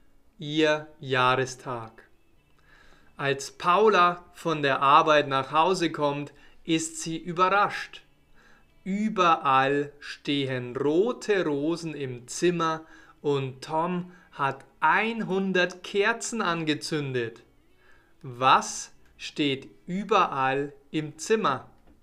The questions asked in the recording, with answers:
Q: Was steht überall im Zimmer?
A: rote Rosen?